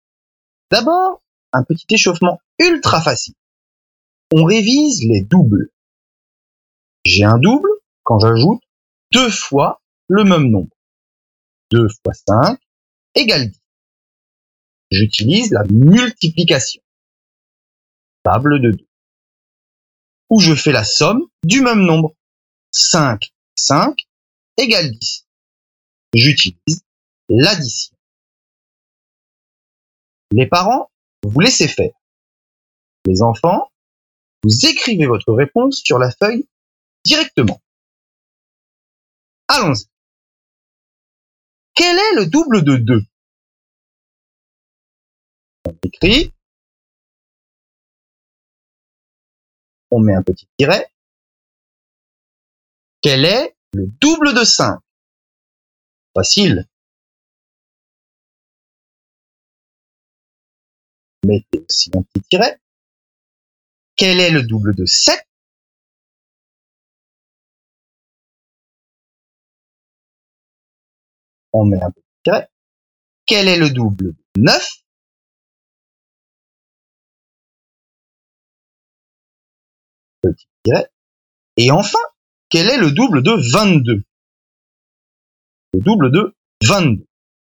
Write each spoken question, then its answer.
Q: Quel est le double de 2?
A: 4 est le double de 2, parce que 2 et 2 font 4, ou 2 fois 2 égale 4.

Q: Quel est le double de 5?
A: 10 est le double de 5, parce que 5 et 5 font 10.

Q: Quel est le double de 7?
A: 14 est le double de 7, parce que 7 plus 7 font 14.

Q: Quel est le double de 9?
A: 18 est le double de 9, parce que 9 plus 9 font 18.

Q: Et enfin, quel est le double de 22?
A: Et 44 est le double de 22, parce que 22 plus 22 font 44.